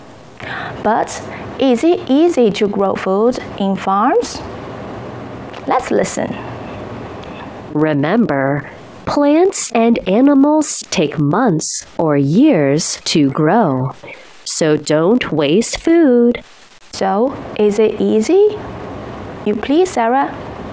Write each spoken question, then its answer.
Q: So is it easy?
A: Of course not.